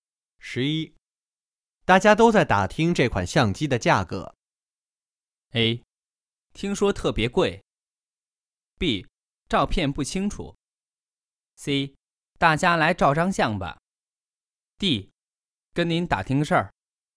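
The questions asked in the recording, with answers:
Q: 大家都在打听这款相机的价格。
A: A: 听说特别贵。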